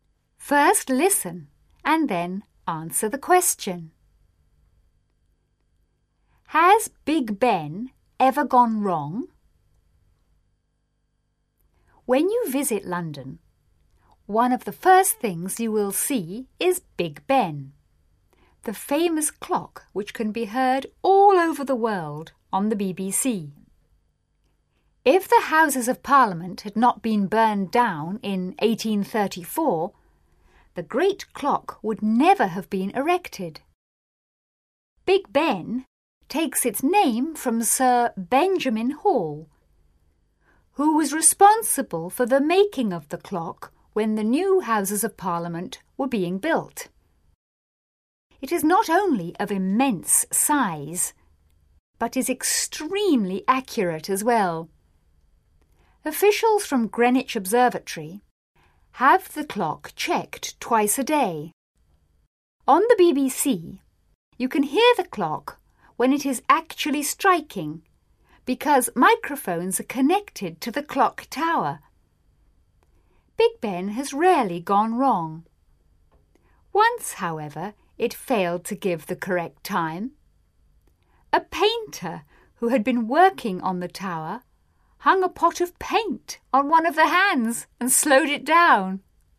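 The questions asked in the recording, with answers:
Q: Has Big Ben ever gone wrong?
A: Yes, once, when a painter hung a pot of paint on one of the hands and slowed it down.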